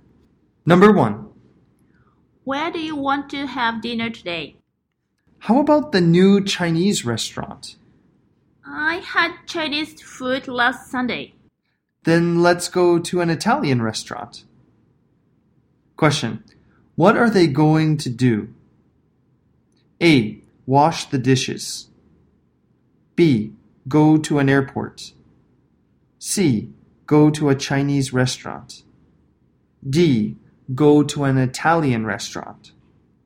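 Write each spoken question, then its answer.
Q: What are they going to do?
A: D: Go to an Italian restaurant.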